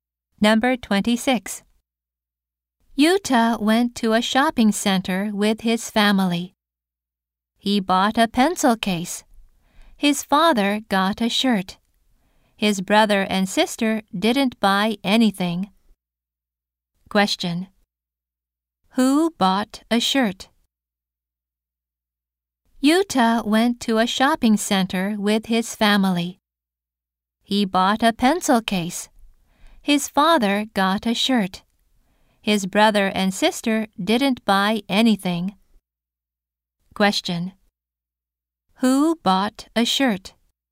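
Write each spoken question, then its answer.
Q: Who bought a shirt?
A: Yuta's father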